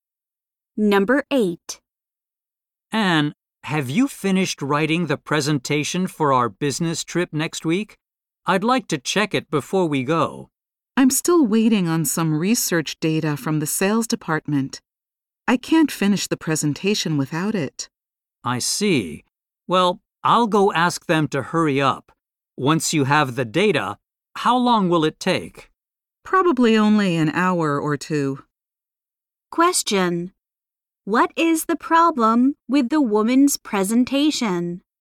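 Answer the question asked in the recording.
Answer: She needs research data from the sales department to finish it.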